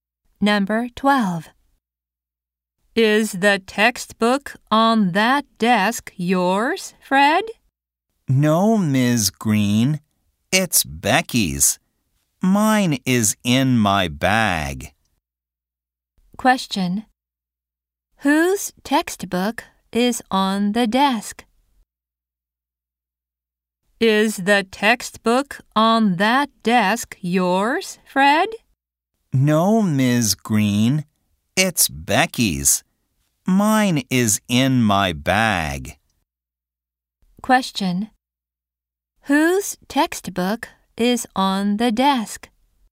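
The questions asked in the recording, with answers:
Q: Whose textbook is on the desk?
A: Becky's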